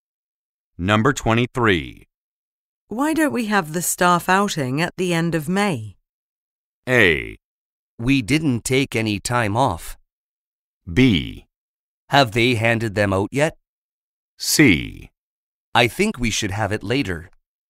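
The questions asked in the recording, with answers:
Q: Why don't we have the staff outing at the end of May?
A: C: I think we should have it later.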